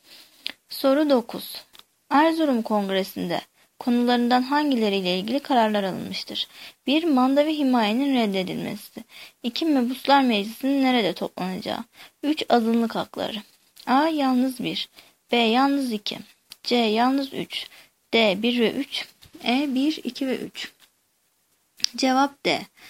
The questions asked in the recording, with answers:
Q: Erzurum Kongresi'nde konularından hangileriyle ilgili kararlar alınmıştır?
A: Cevap D. 1 ve 3.